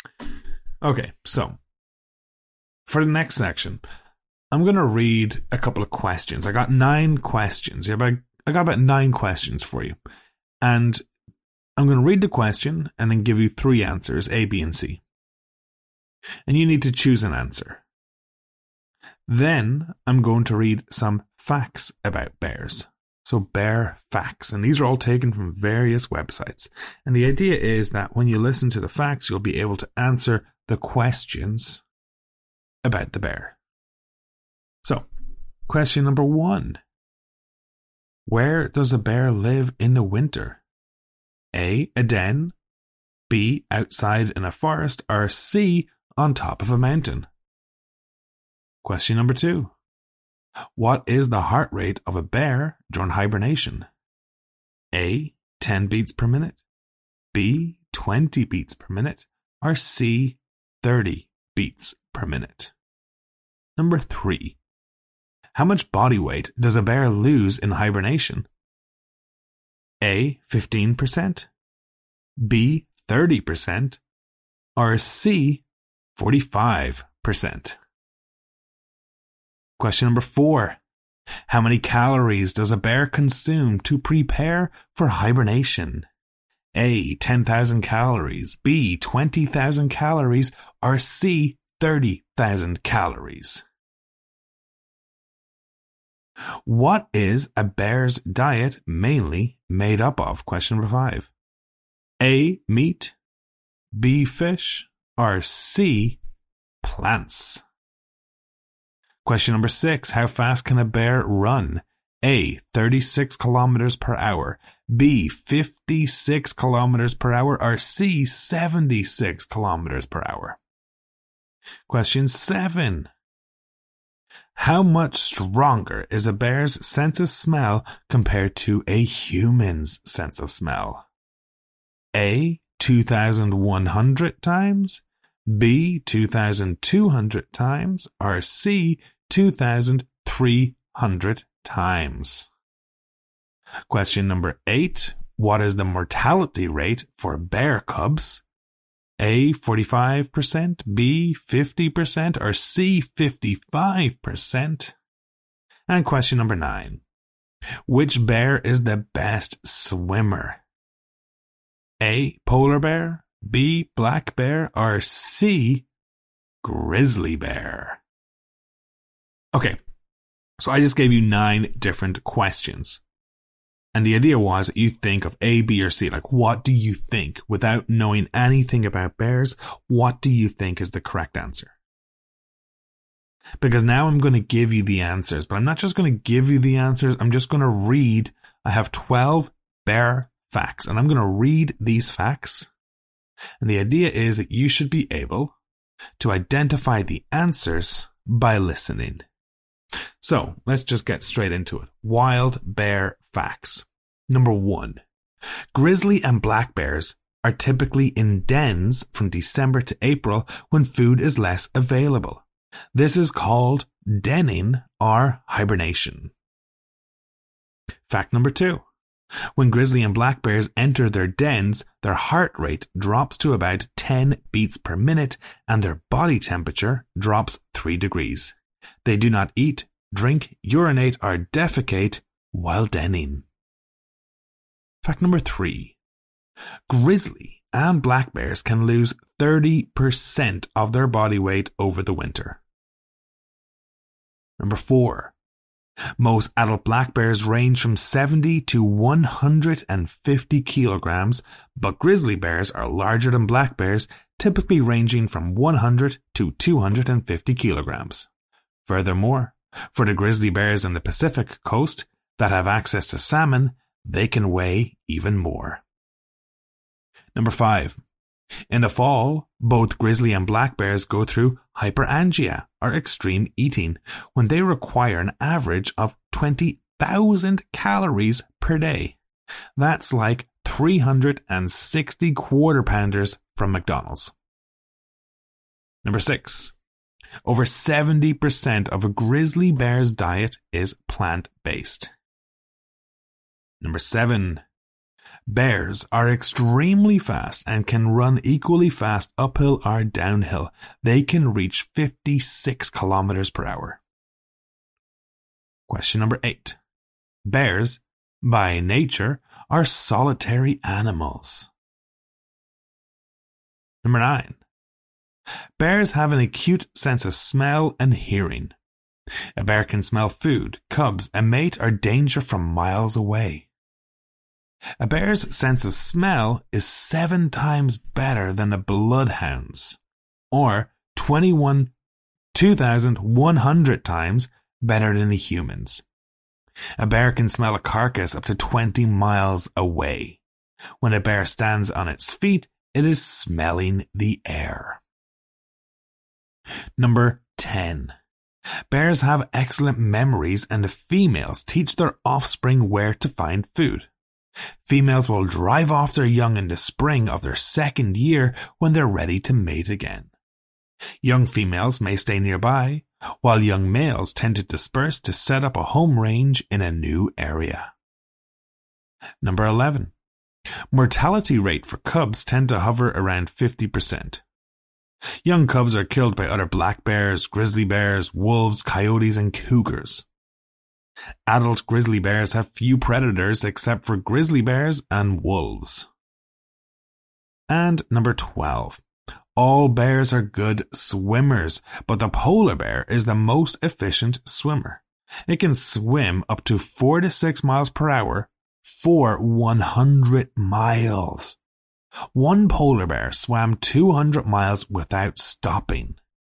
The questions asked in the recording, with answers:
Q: Where does a bear live in the winter?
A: 1A

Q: What is the heart rate of a bear during hibernation?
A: 2A

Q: How much body weight does a bear lose in hibernation?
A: 3B

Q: How many calories does a bear consume to prepare for hibernation?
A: 4B

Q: What is a bear's diet mainly made up of?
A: 5C

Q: How much stronger is a bear's sense of smell compared to a human's sense of smell?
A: 7A

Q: What is the mortality rate for bear cubs?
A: 8B

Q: Which bear is the best swimmer?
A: 9A